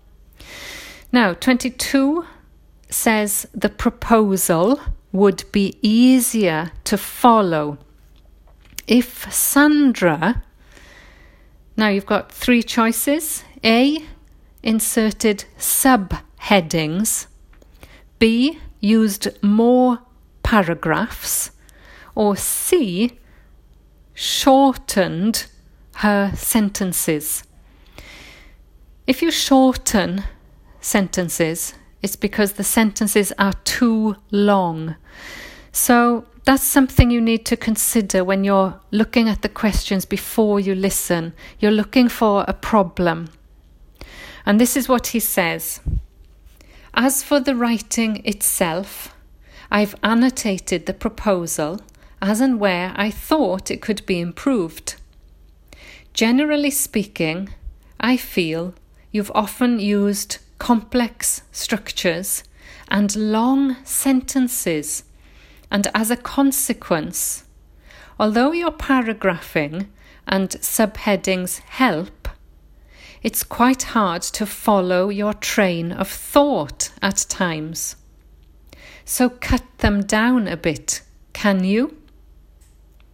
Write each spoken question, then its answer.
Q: the proposal would be easier to follow if Sandra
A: which gives us answer C, shorten her sentences.